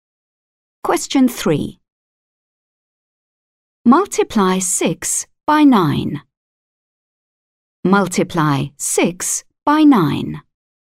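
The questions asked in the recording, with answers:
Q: Multiply 6 by 9.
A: 54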